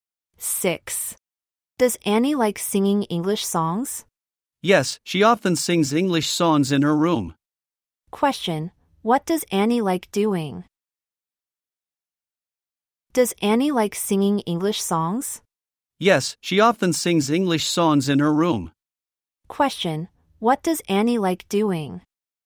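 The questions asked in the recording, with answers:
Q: what does Annie like doing?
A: Singing English songs.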